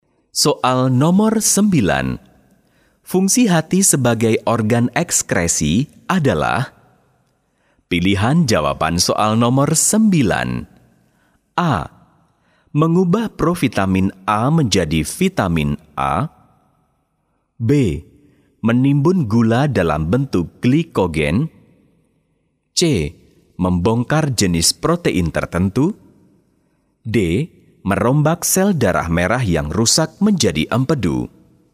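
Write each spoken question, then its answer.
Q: Fungsi hati sebagai organ ekskresi adalah?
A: D: Merombak sel darah merah yang rusak menjadi empedu.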